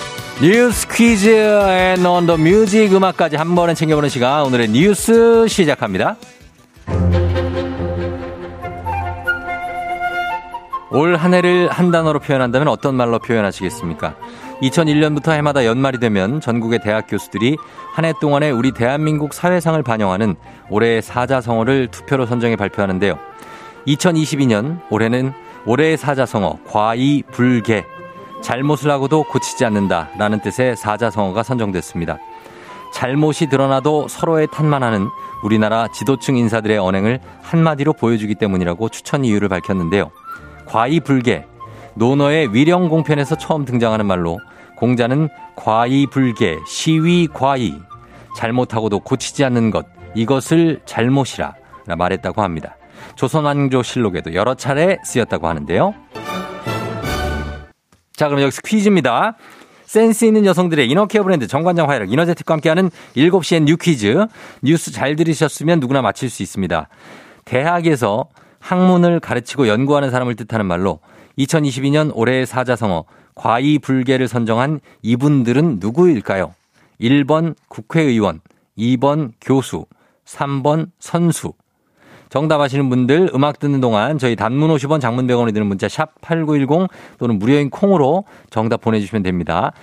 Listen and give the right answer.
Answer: 정답은 2번 교수, 교수님들이죠.